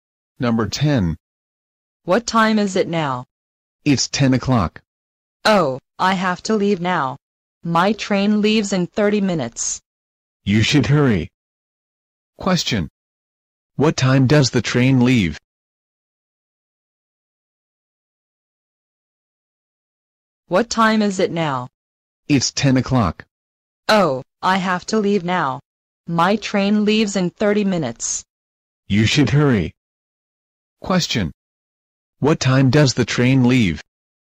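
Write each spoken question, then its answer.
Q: What time does the train leave?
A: 10:30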